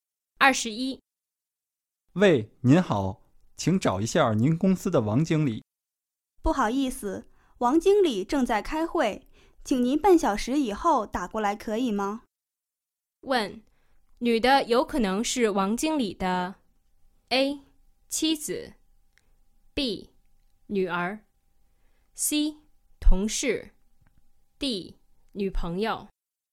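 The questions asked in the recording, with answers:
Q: 问,女的有可能是王经理的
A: C: 同事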